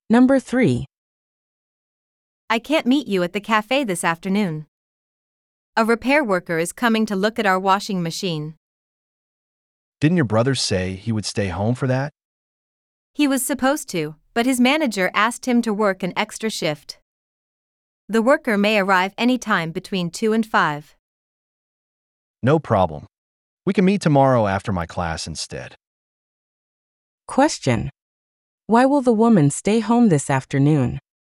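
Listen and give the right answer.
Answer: A repair worker is coming to look at the washing machine, and her brother has to work an extra shift.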